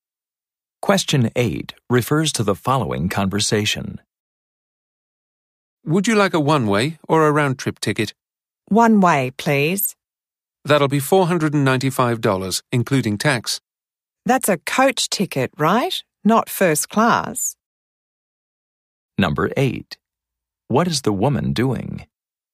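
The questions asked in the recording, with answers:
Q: What is the woman doing?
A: Buying a one-way ticket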